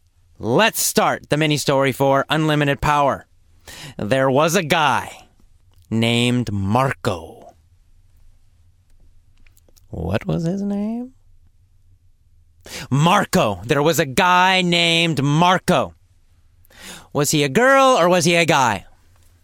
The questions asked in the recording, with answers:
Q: Was he a girl or was he a guy?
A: He was a guy, of course.